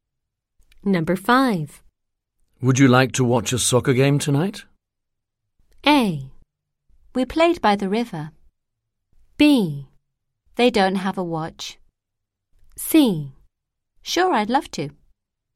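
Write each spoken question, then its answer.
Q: Would you like to watch a soccer game tonight?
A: C: Sure, I'd love to.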